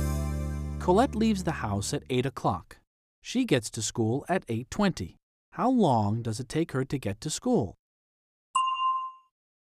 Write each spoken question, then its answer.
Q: How long does it take her to get to school?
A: It takes her 20 minutes. It takes her 20 minutes to get to school.